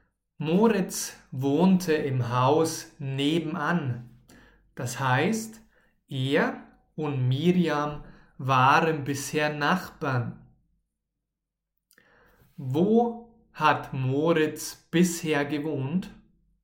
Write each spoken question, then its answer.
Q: Wo hat Moritz bisher gewohnt?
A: Im Haus nebenan. Er hat bisher im Haus nebenan gewohnt?